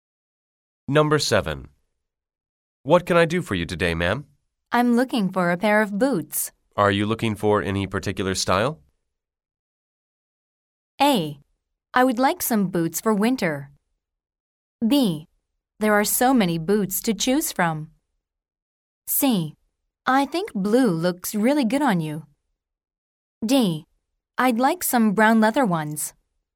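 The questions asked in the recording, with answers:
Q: Are you looking for any particular style?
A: D: I'd like some brown leather ones.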